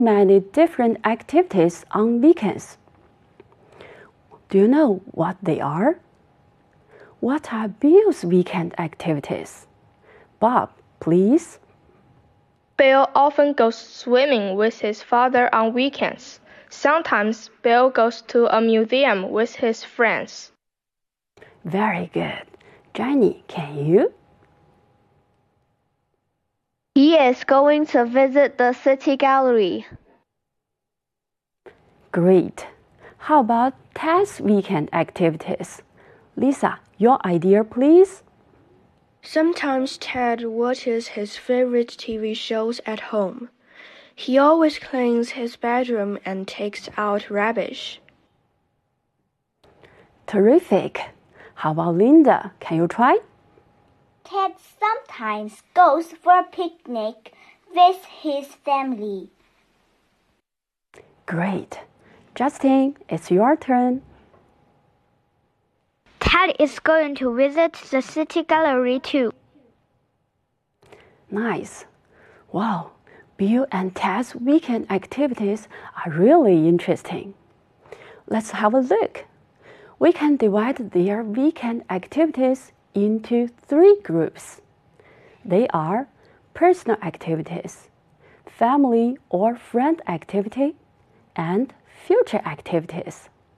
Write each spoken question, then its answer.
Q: What are Bill's weekend activities?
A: Bill often goes swimming with his father on weekends.